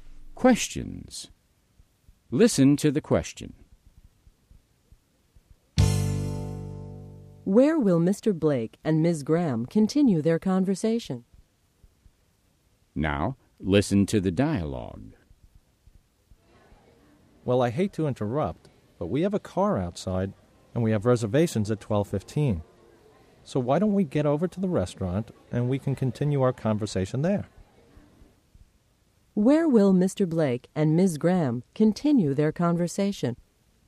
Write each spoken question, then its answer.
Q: Where will Mr. Blake and Ms. Graham continue their conversation?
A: They'll continue their conversation at the restaurant.